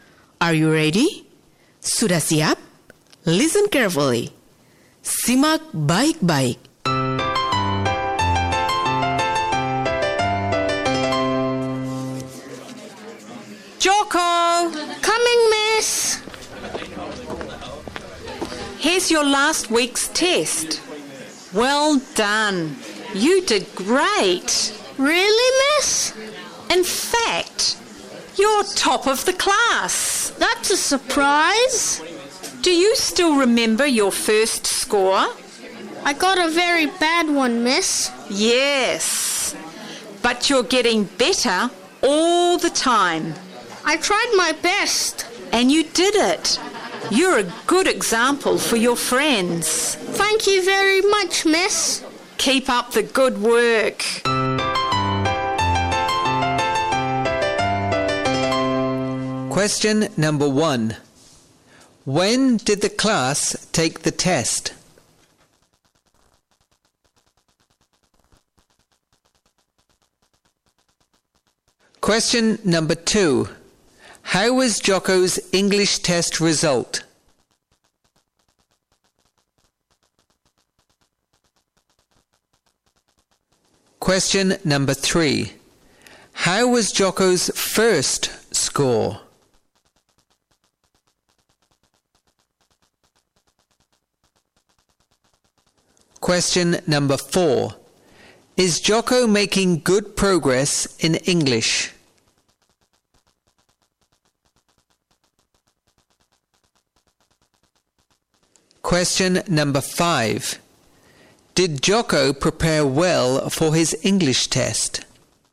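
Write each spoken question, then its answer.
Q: When did the class take the test?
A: Last week

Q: How was Joko's English test result?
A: Very good; he was top of the class

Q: How was Joko's first score?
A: Very bad

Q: Is Joko making good progress in English?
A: Yes, he is getting better all the time

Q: Did Joko prepare well for his English test?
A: Yes, he tried his best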